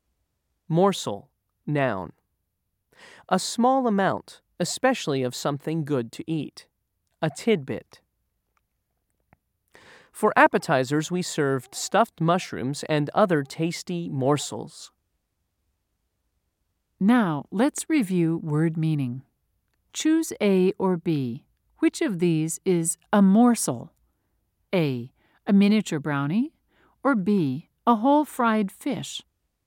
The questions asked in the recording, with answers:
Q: Choose A or B. Which of these is a morsel?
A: If you said A, you're right.